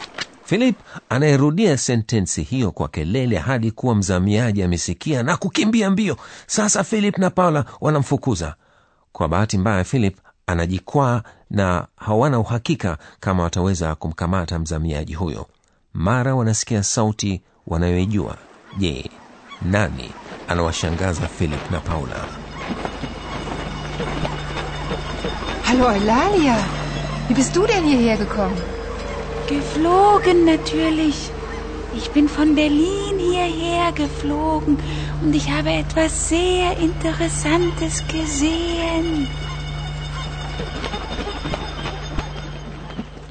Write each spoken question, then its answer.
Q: je nani anawashangaza philip na paula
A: ni oilalia yule bundi mwenye kusema anayejitokeza kwa ghafla